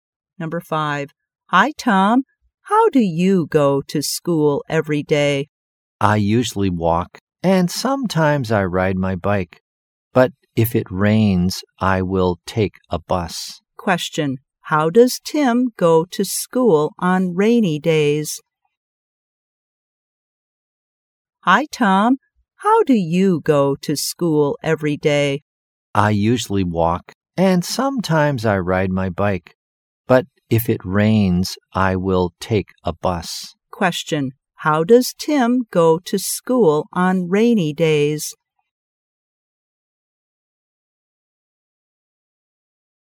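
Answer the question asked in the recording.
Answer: By bus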